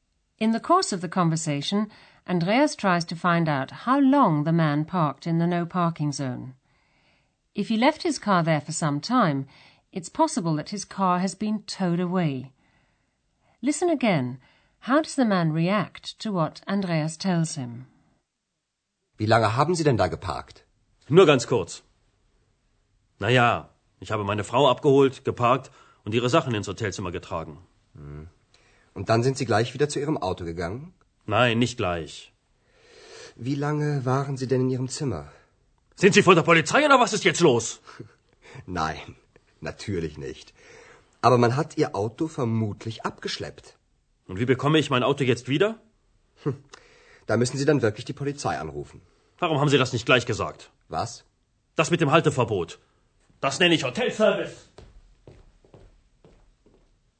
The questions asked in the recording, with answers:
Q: How does the man react to what Andreas tells him?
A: The man is annoyed about his car and takes it out on Andreas.